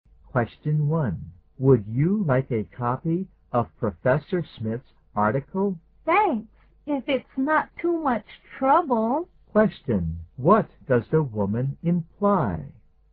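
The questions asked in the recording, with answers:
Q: What does the woman imply?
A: She would like a copy of Professor Smith's article.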